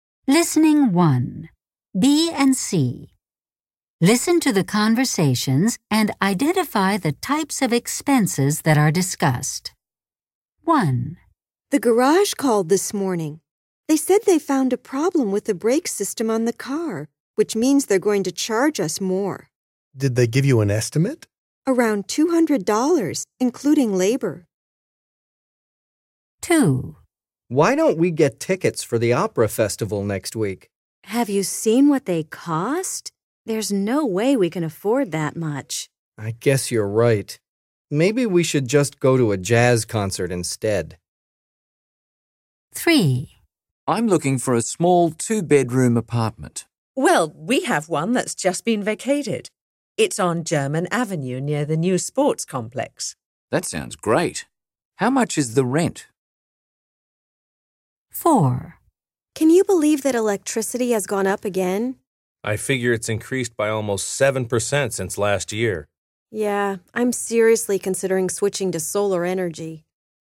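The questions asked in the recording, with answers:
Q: Listen to the conversations and identify the types of expenses that are discussed.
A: car repairs

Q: Listen to the conversations and identify the types of expenses that are discussed.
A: entertainment (concert tickets)

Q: Listen to the conversations and identify the types of expenses that are discussed.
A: rent (housing)

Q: Listen to the conversations and identify the types of expenses that are discussed.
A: electricity (utilities)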